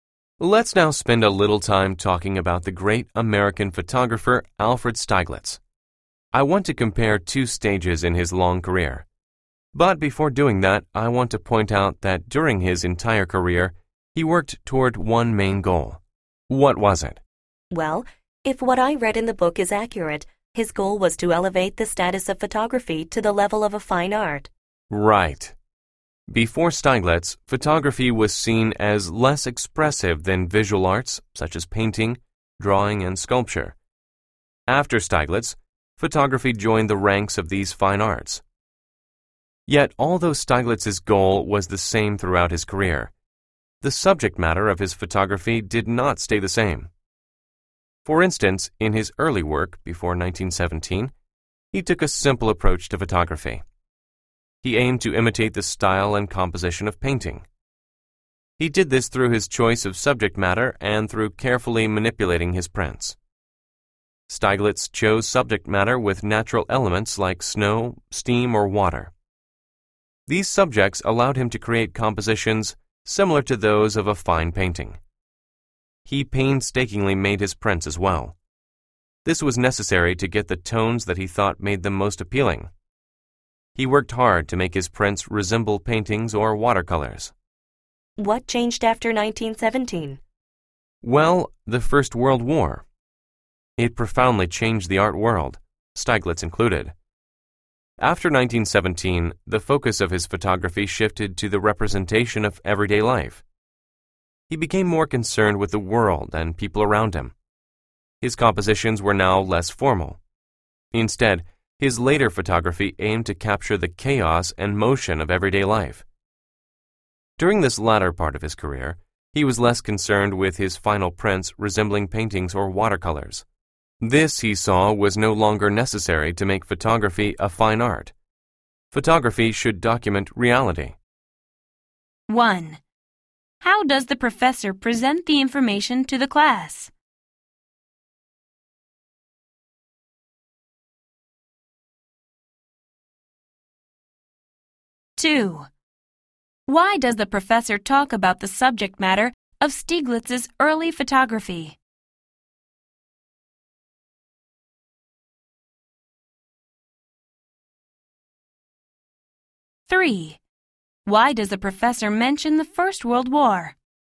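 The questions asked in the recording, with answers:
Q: How does the professor present the information to the class?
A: By comparing two stages of Stieglitz's career (before and after 1917)

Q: Why does the professor talk about the subject matter of Stieglitz's early photography?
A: To show how he imitated painting, choosing natural subjects like snow, steam or water

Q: Why does the professor mention the First World War?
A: To explain why his photography changed after 1917 to show everyday life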